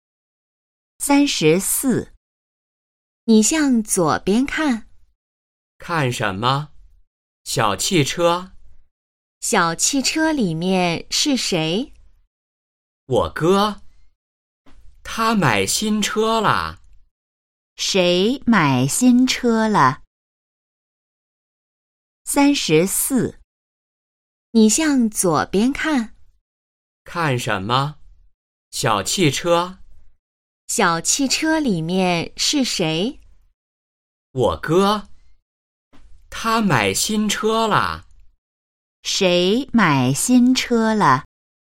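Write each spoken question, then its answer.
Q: 谁买新车了?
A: 我哥(说话人的哥哥)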